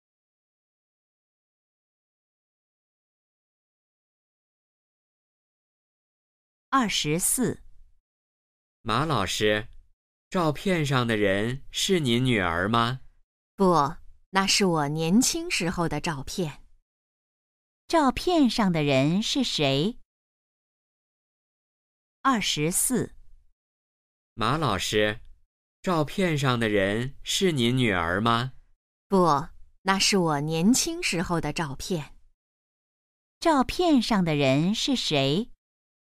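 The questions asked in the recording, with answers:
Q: 照片上的人是谁?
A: 马老师自己(年轻时)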